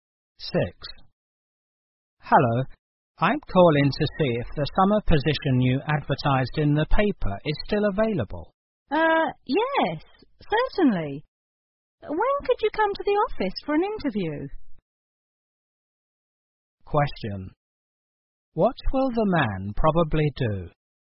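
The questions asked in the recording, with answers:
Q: What will the man probably do?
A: Go to the office for a job interview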